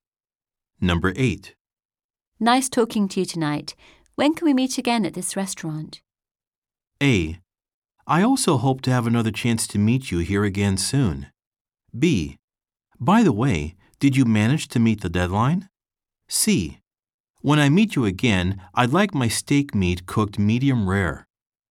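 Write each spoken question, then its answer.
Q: When can we meet again at this restaurant?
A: A: I also hope to have another chance to meet you here again soon.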